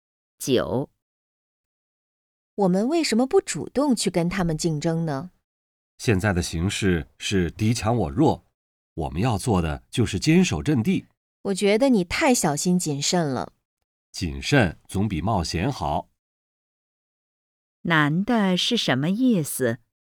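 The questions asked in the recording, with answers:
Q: 难的是什么意思?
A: 应该谨慎,坚守阵地,不主动竞争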